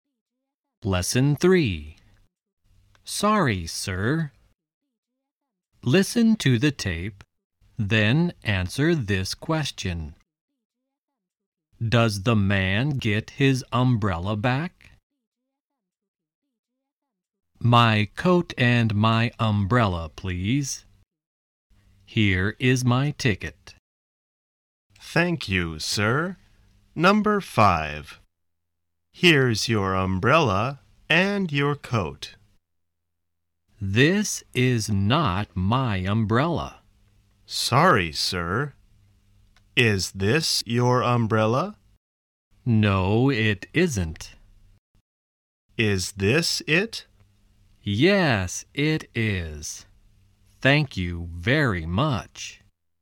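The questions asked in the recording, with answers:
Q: Does the man get his umbrella back?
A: Yes, he does.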